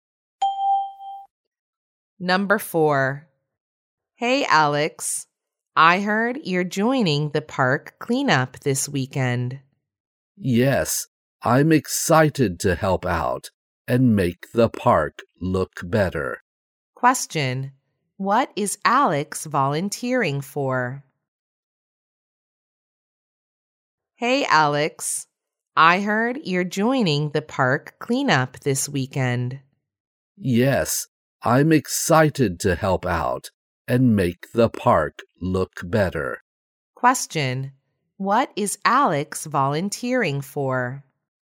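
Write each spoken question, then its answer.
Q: What is Alex volunteering for?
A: The park cleanup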